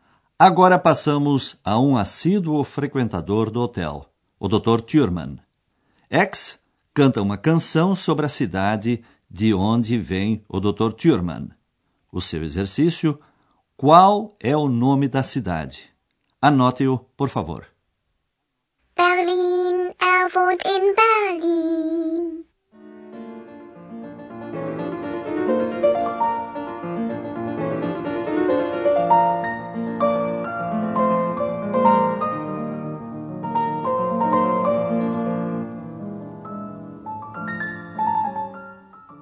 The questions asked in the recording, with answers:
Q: qual é o nome da cidade?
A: A quinta palavra procurada é Berlin.